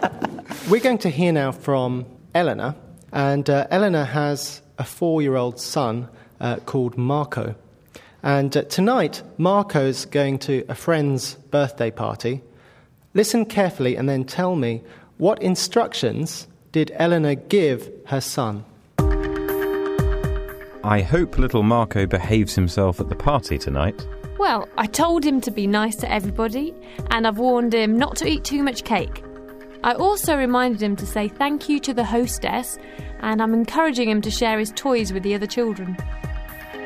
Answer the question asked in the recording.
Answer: Eleanor told Marco to be nice to everybody.